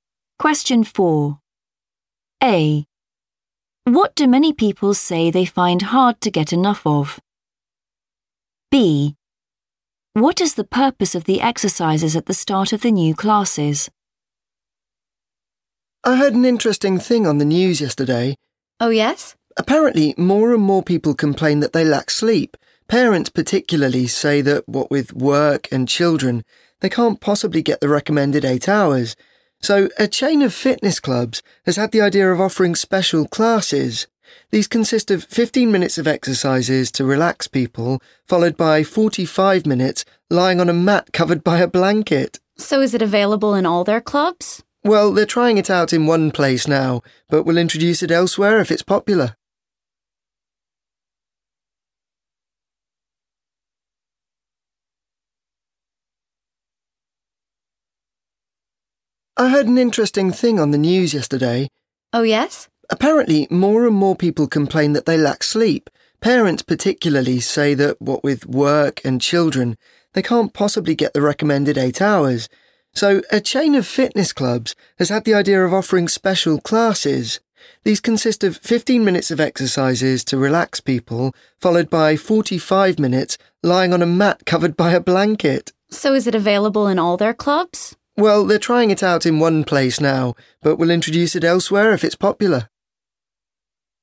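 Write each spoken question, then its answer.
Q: What do many people say they find hard to get enough of?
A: sleep

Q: What is the purpose of the exercises at the start of the new classes?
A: to relax people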